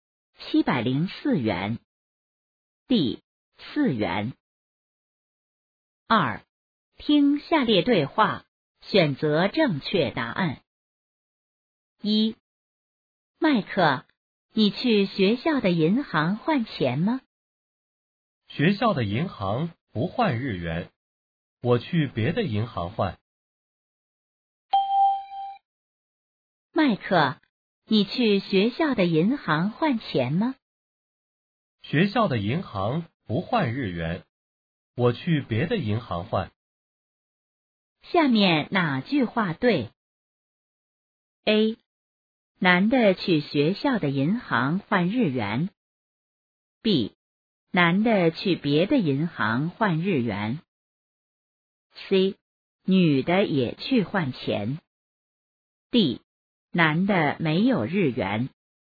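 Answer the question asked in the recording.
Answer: B: 男的去别的银行换日元。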